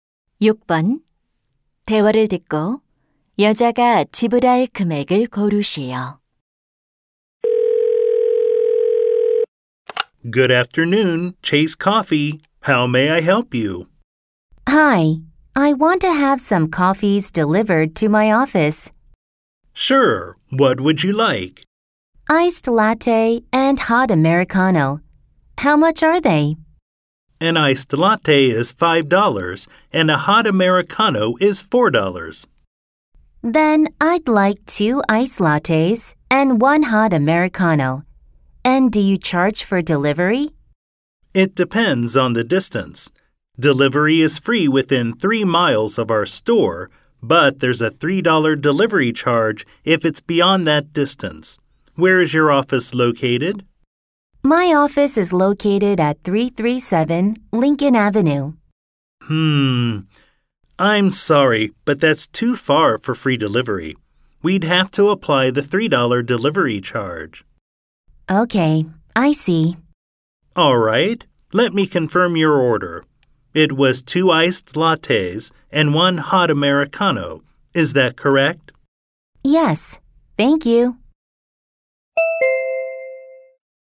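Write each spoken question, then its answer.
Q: 대화를 듣고 여자가 지불할 금액을 고르시오.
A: $17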